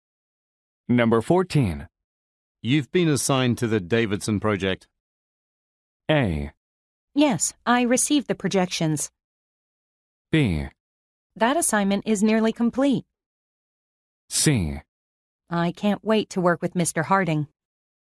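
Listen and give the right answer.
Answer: C: I can't wait to work with Mr. Harding.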